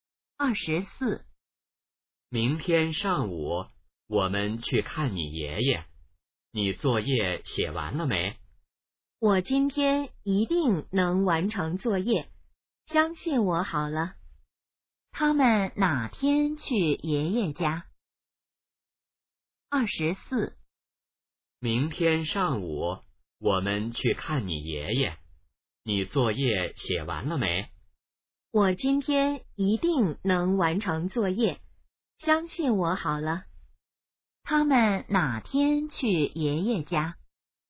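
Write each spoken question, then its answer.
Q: 他们哪天去爷爷家?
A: 明天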